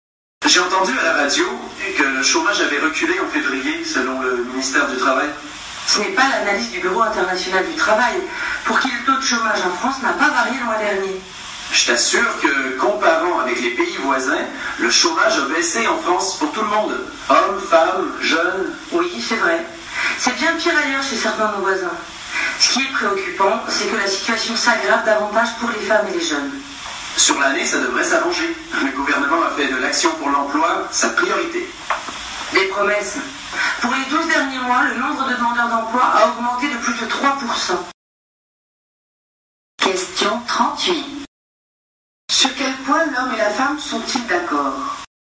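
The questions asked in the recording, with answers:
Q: Sur quel point l'homme et la femme sont-ils d'accord ?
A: La situation du chômage est bien pire chez certains pays voisins.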